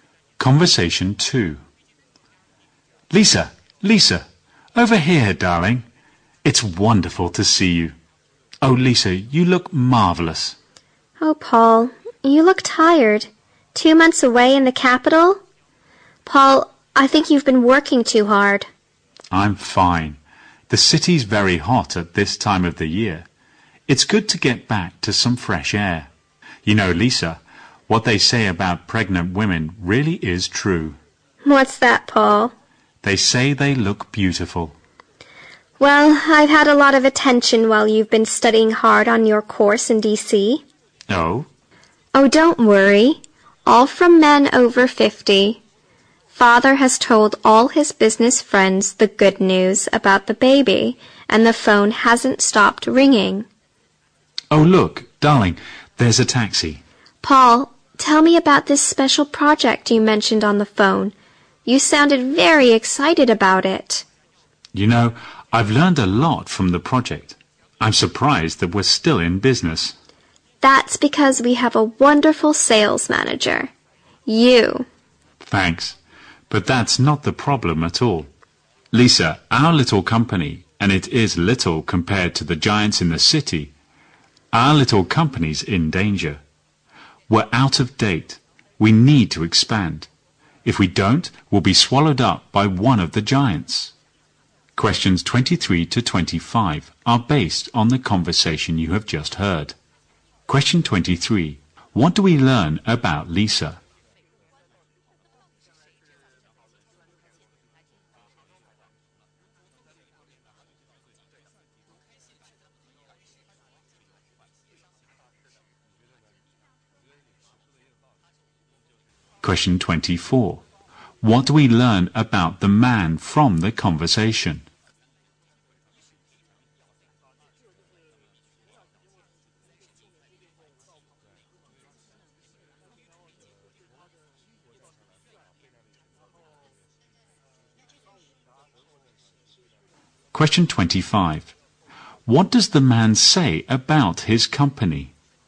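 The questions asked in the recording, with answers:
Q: What do we learn about Lisa?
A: She is pregnant.

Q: What do we learn about the man from the conversation?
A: He has just come back from two months studying on a course in D.C.

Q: What does the man say about his company?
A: It is small and in danger; it needs to expand.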